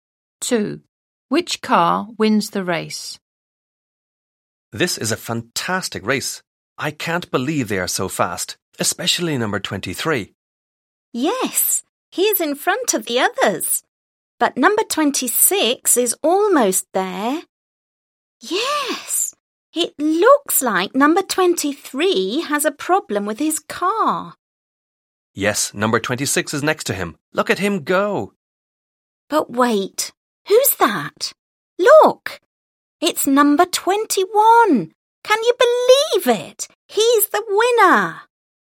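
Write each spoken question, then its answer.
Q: Which car wins the race?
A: Number 21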